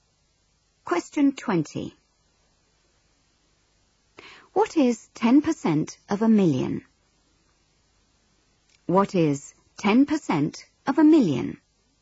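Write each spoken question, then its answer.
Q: What is 10% of a million?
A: 100,000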